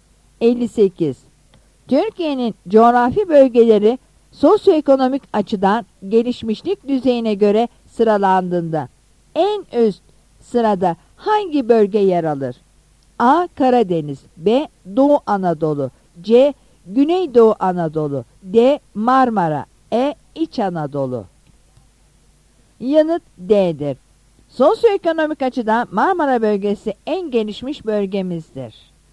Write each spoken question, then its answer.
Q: Türkiye'nin coğrafi bölgeleri sosyoekonomik açıdan gelişmişlik düzeyine göre sıralandığında en üst sırada hangi bölge yer alır?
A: Yanıt D'dir.